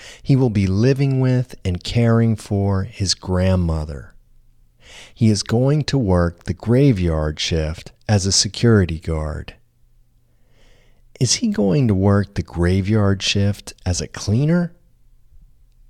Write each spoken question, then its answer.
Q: Is he going to work the graveyard shift as a cleaner?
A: No, he isn't going to work the graveyard shift as a cleaner.